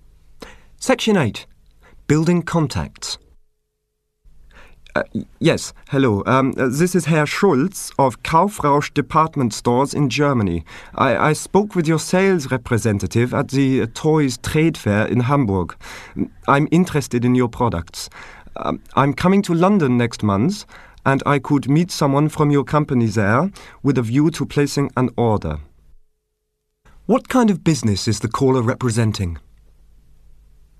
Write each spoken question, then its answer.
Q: What kind of business is the caller representing?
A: He's representing a department store chain in Germany.